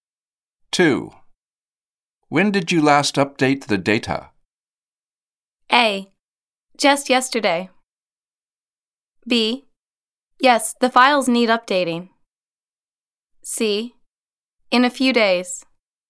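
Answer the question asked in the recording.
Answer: A: Just yesterday.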